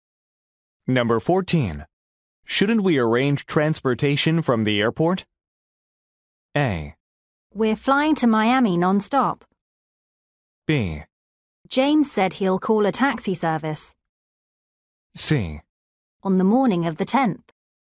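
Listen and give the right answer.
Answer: B: James said he'll call a taxi service.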